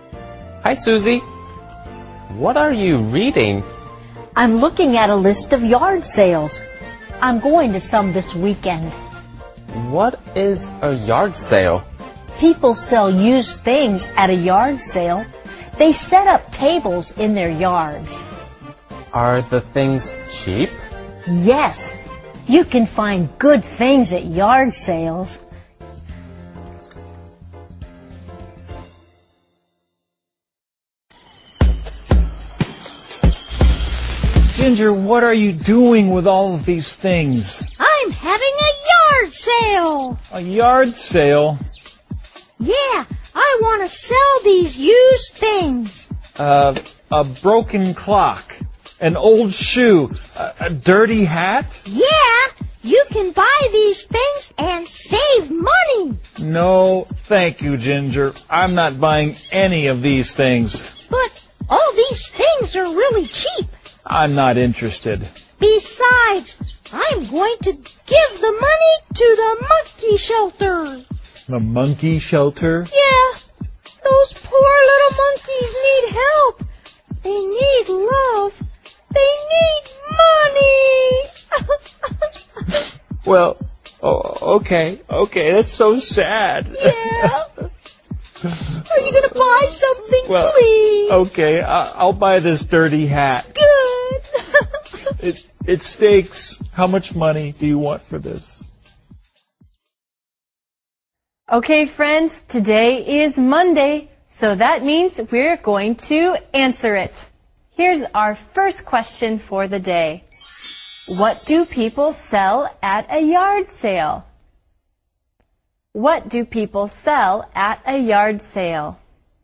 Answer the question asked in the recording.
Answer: They sell used things.